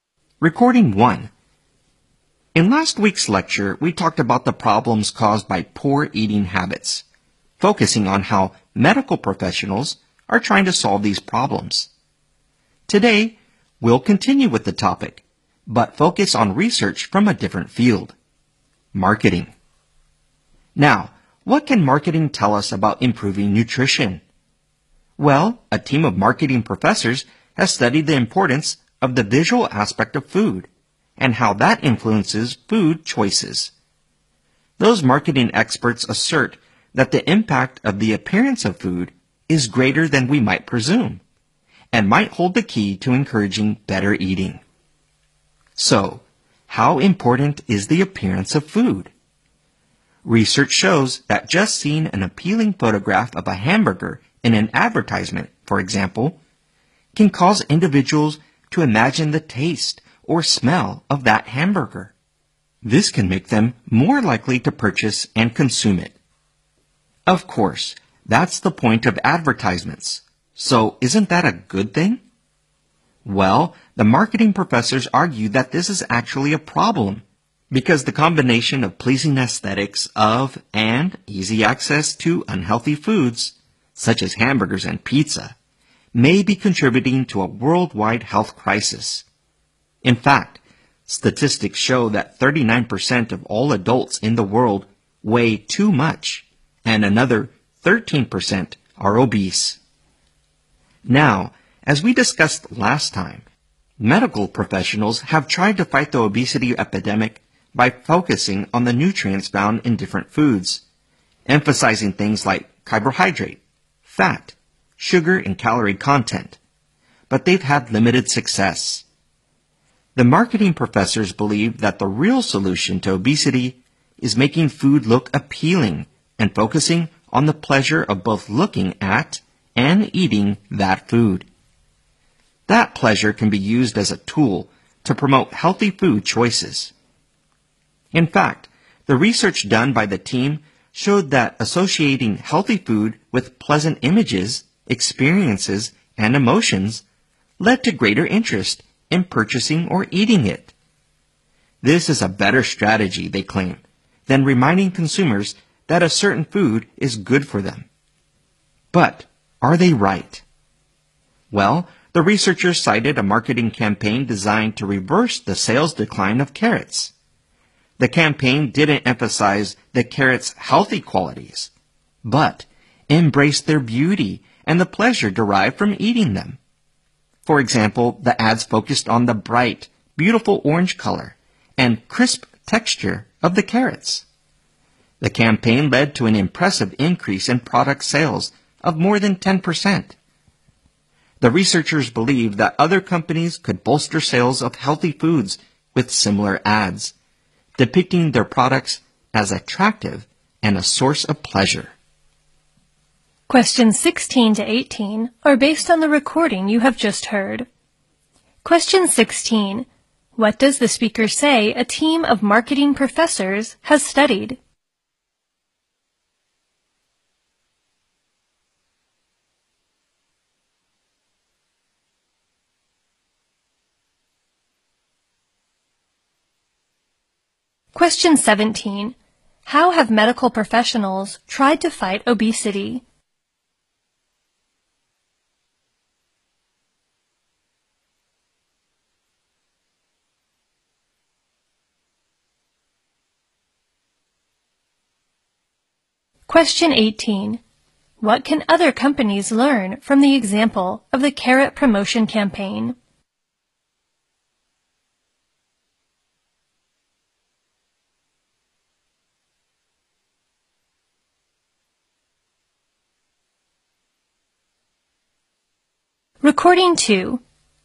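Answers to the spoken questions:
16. How the appearance of food influences food choices.
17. By focusing on the nutrients in different foods.
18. They can raise sales of healthy foods by showing them as attractive and a source of pleasure.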